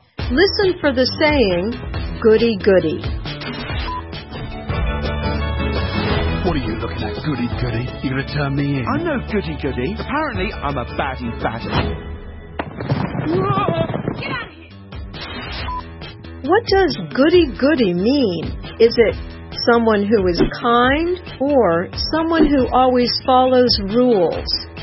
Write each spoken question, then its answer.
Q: What does goody goody mean?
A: The answer is B. Someone who always follows rules.